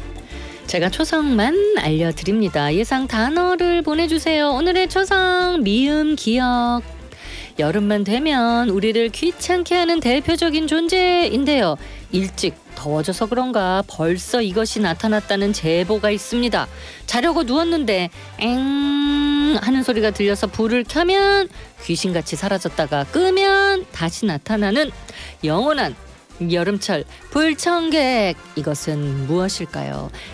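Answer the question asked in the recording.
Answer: 모기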